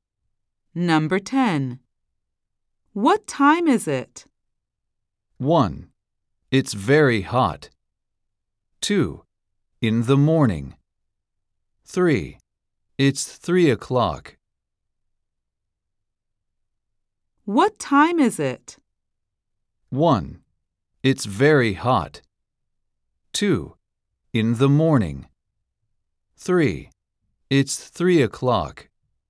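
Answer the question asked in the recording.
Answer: 3: It's 3 o'clock.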